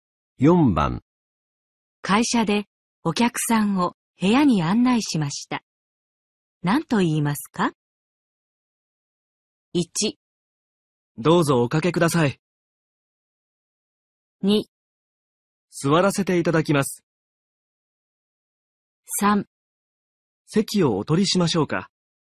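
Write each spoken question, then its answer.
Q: 会社でお客さんを部屋に案内しました。何と言いますか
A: 1: どうぞおかけください。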